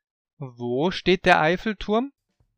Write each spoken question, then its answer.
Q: Wo steht der Eiffelturm?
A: In Paris, in Frankreich.